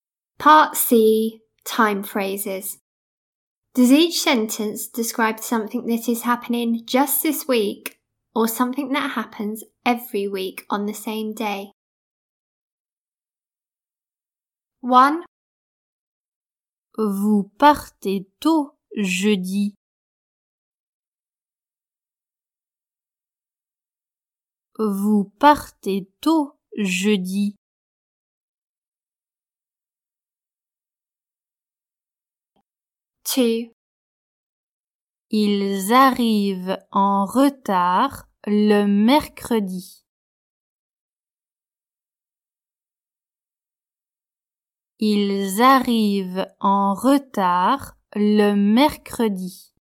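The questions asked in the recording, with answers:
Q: Does each sentence describe something that is happening just this week or something that happens every week on the same day?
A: Just this week

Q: Does each sentence describe something that is happening just this week or something that happens every week on the same day?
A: Every week on the same day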